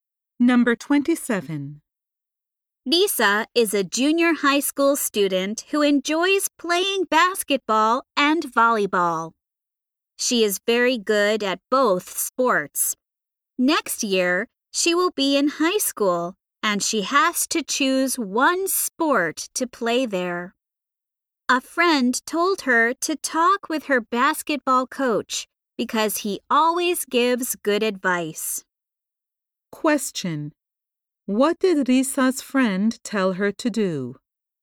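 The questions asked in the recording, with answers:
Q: What did Risa's friend tell her to do?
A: Talk with her basketball coach.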